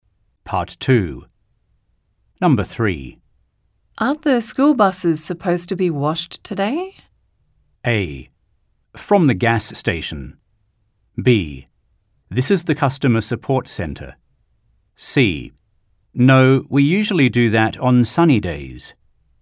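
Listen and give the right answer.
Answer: C: No, we usually do that on sunny days.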